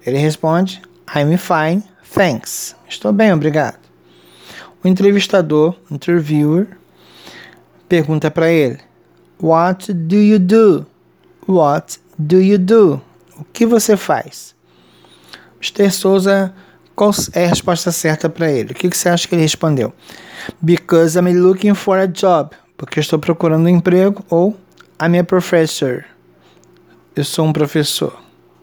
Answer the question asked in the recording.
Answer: Muito bem. I'm a professor.